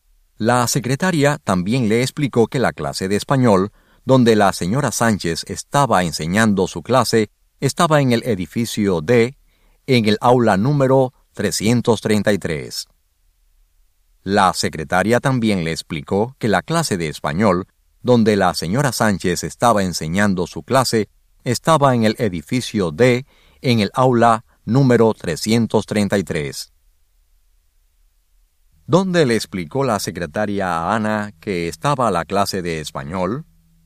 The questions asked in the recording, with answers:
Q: ¿Dónde le explicó la secretaria a Ana que estaba la clase de español?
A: Le explicó que la clase de la señora Sánchez estaba en la aula número